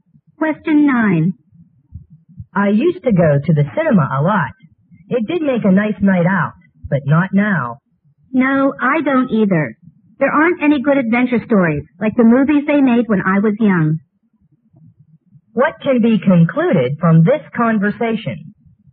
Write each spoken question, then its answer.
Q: What can be concluded from this conversation?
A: They're disappointed with the film produced these days